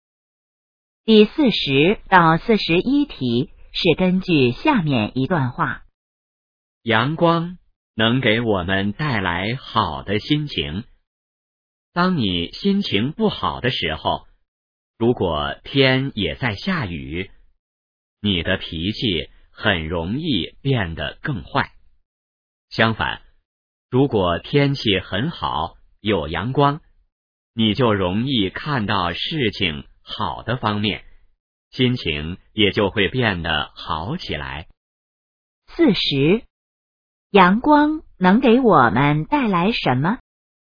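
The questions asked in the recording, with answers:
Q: 阳光能给我们带来什么?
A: 好的心情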